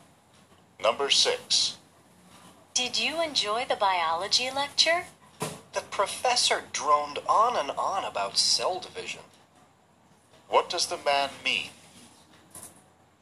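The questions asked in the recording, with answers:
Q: What does the man mean?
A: The lecture was boring.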